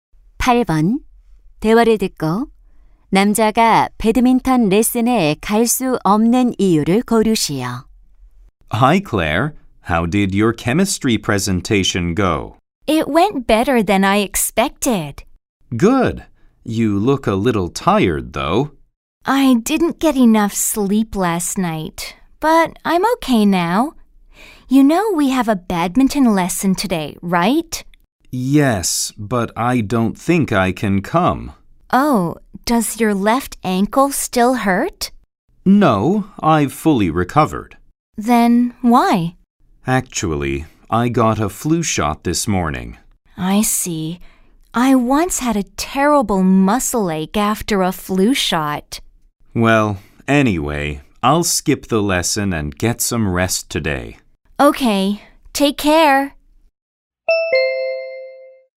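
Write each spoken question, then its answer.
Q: 남자가 배드민턴 레슨에 갈 수 없는 이유를 고르시오.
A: 독감 예방 주사를 맞아서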